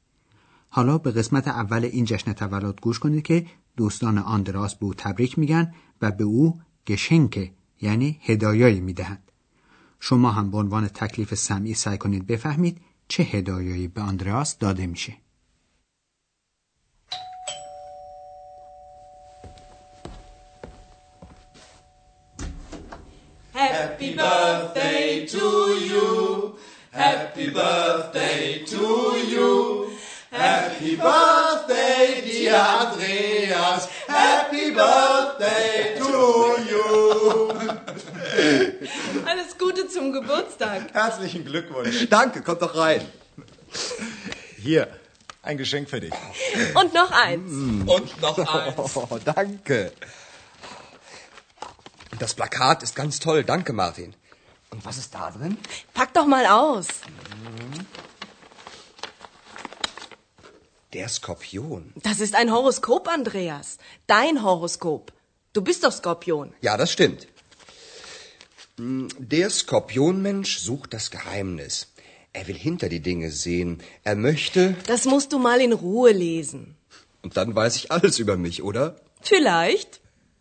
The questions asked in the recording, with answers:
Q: شما هم به عنوان تکلیف سمعی سعی کنید بفهمید چه هدایایی به آندراس داده میشه.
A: آندراس دو تا از هدیه ها رو باز میکنه که یکی از اونها یک پوستر یا تصویر دیواری و دومی یک زایجه یعنی پیشگویی سرنوشت شخص از روی ستارگانه